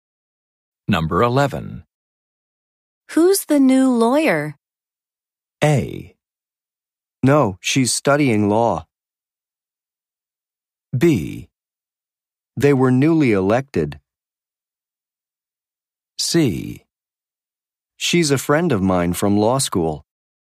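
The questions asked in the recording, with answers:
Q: Who's the new lawyer?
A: C: She's a friend of mine from law school.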